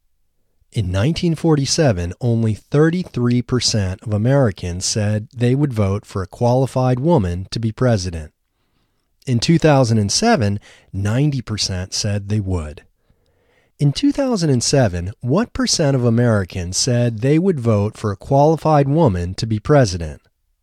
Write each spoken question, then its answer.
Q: In 2007, what percent of Americans said they would vote for a qualified woman to be president?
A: In 2007, 90% of Americans said they would vote for a qualified woman to be president.